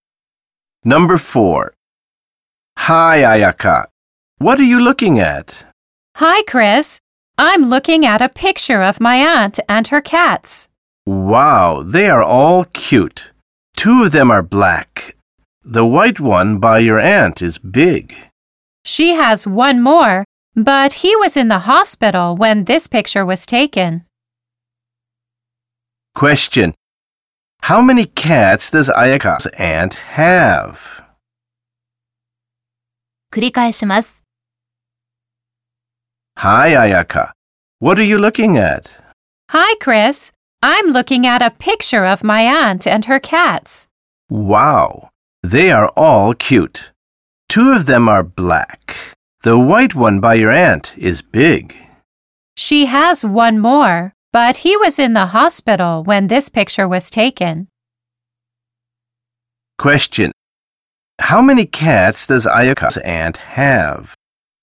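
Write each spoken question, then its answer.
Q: How many cats does Ayaka's aunt have?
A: Four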